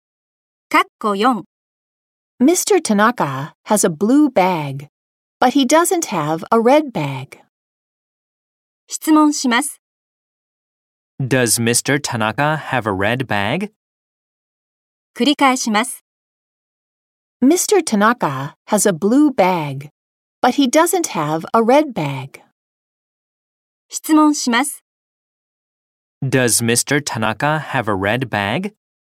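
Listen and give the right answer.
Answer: No, he doesn't.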